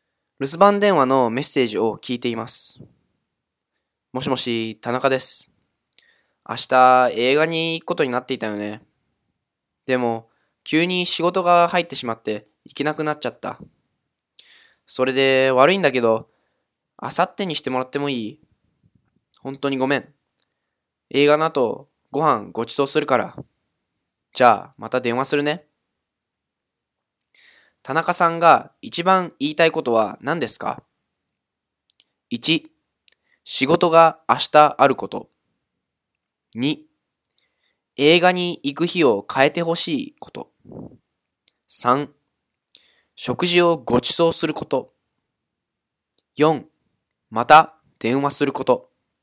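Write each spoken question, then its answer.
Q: 田中さんが一番言いたいことは何ですか?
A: 2: 映画に行く日を変えてほしいこと。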